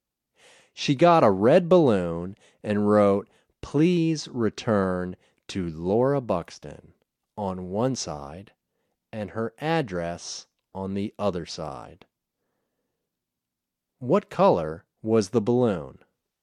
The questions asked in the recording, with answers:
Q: What color was the balloon?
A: It was a red balloon.